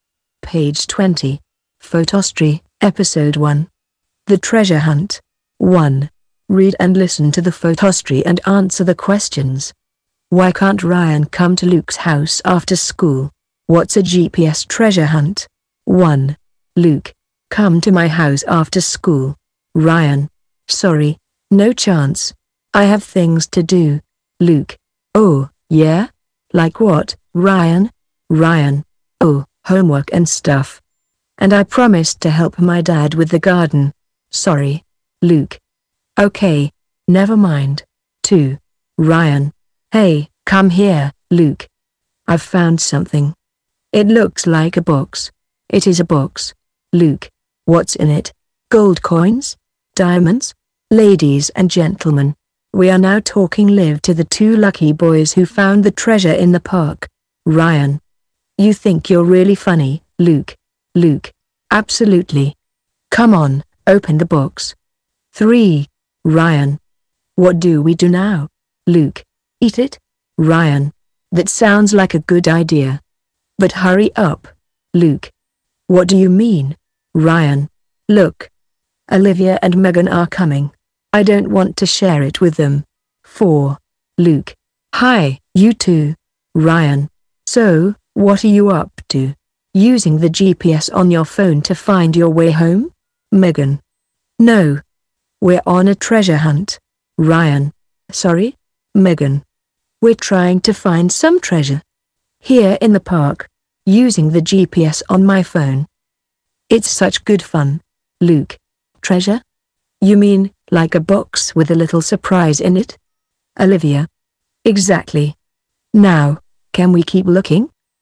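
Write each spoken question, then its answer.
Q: Why can't Ryan come to Luke's house after school?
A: He has homework and promised to help his dad with the garden.

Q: What's a GPS treasure hunt?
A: Using the GPS on a phone to find treasure, like a box with a little surprise in it, hidden in the park.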